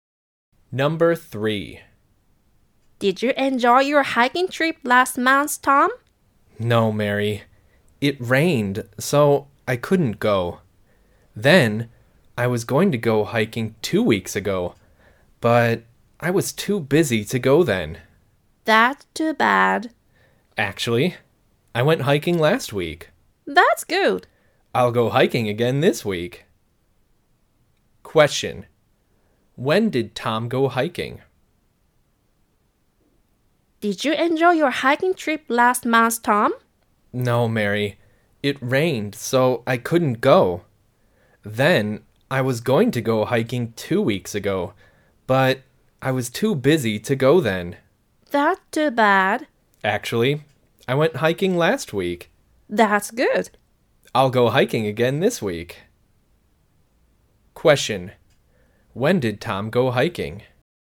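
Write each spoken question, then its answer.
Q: When did Tom go hiking?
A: Last week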